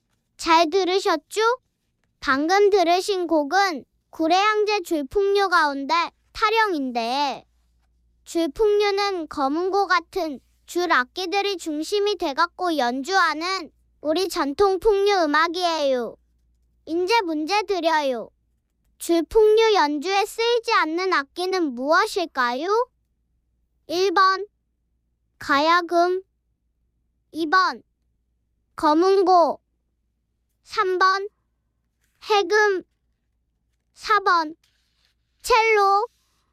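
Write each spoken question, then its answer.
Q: 줄풍류 연주에 쓰이지 않는 악기는 무엇일까요?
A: 4번: 첼로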